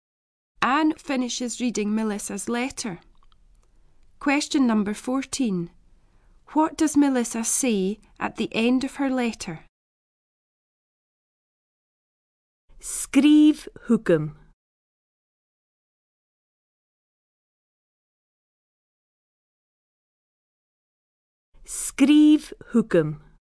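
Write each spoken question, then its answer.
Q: What does Melissa say at the end of her letter?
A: Write to me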